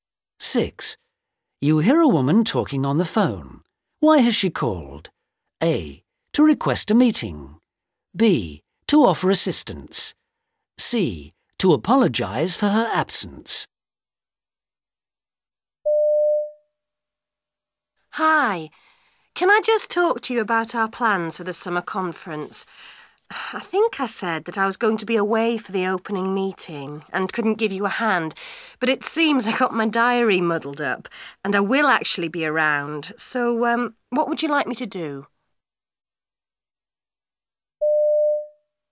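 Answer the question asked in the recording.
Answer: B: To offer assistance.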